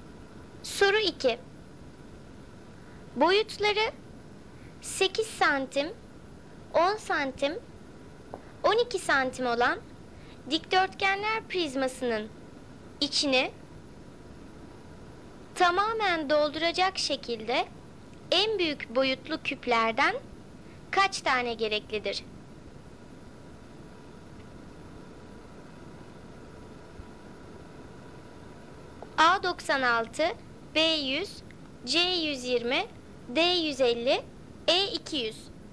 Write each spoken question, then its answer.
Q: Boyutları 8 santim, 10 santim, 12 santim olan dikdörtgenler prizmasının içini tamamen dolduracak şekilde en büyük boyutlu küplerden kaç tane gereklidir?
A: Doğru cevap C 120.